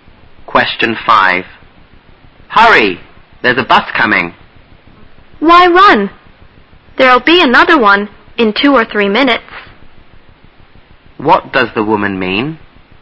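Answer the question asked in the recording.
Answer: There's no need to hurry; another bus will come in 2 or 3 minutes.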